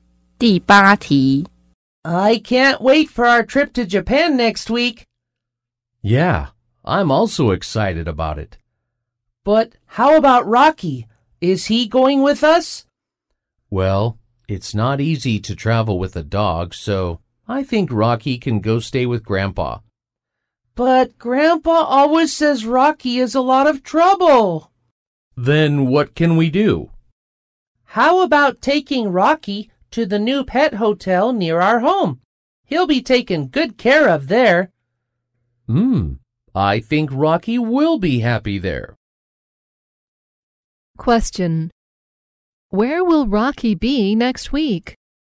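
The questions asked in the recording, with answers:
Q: Where will Rocky be next week?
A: At the new pet hotel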